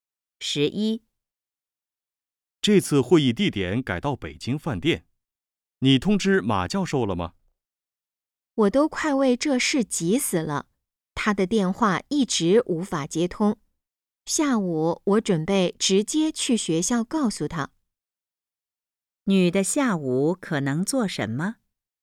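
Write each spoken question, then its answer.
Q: 女的下午可能做什么?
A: 去学校通知马教授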